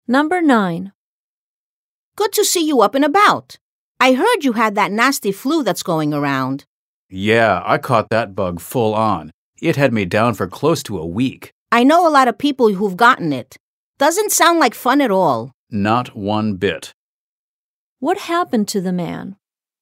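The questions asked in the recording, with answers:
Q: What happened to the man?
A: He had the flu and was sick for almost a week.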